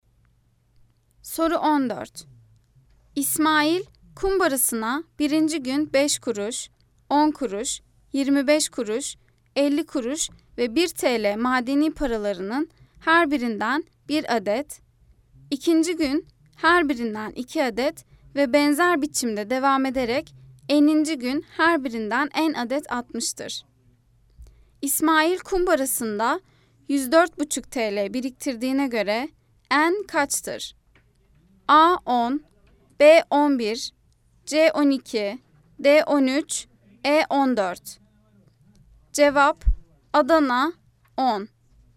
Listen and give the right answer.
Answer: Cevap Adana 10.